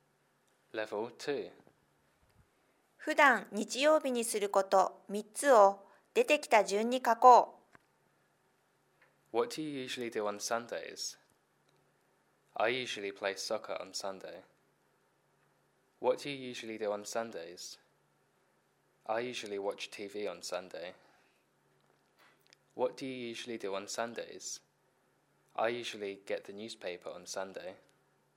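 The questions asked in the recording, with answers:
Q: 普段日曜日にすること3つを出てきた順に書こう。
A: サッカー(play soccer)、テレビを見る(watch TV)、新聞を取ってくる(get the newspaper)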